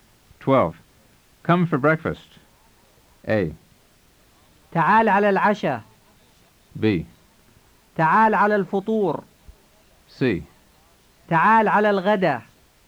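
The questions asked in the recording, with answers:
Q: Come for breakfast.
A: B: تعال على الفطور.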